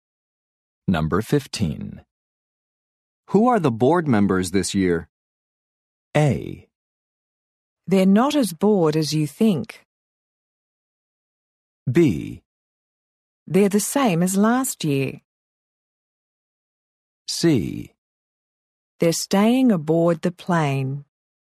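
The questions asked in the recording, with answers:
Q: Who are the board members this year?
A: B: They're the same as last year.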